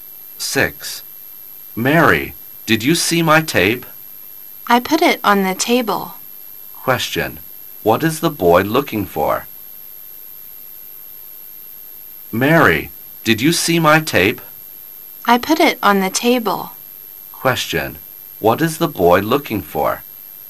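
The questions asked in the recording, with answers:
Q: What is the boy looking for?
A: His tape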